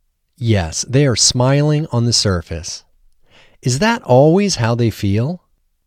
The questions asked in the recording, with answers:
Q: Is that always how they feel?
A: No, that's not always how they feel.